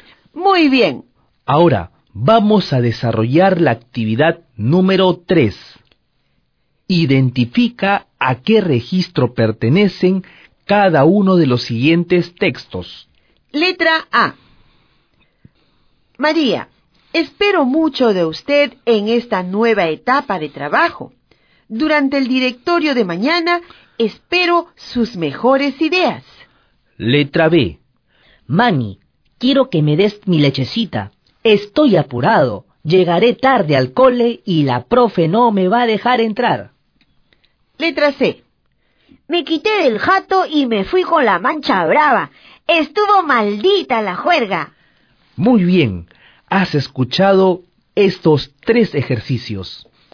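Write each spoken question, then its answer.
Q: Letra A. María, espero mucho de usted en esta nueva etapa de trabajo.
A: Registro formal

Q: Letra B.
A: Registro informal (coloquial)

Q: Letra C. Me quité del jato y me fui con la mancha brava.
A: Registro informal (jerga)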